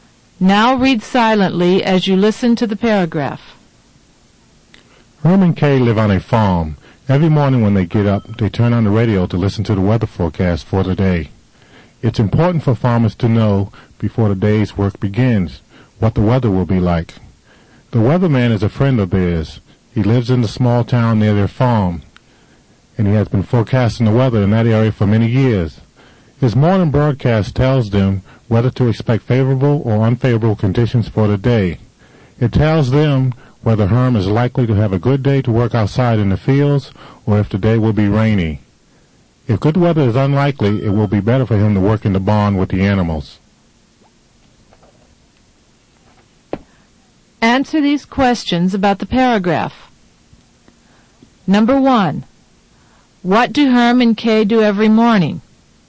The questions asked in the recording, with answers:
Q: What do Herm and Kay do every morning?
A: They listen to the weather forecast for the day.